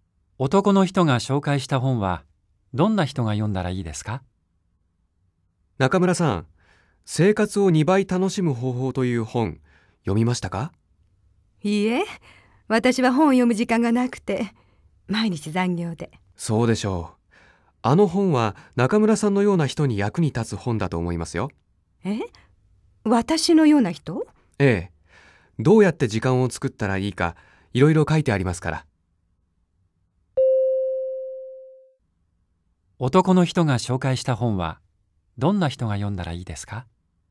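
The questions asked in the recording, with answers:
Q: 男の人が紹介した本はどんな人が読んだらいいですか?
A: 忙しくて時間がない人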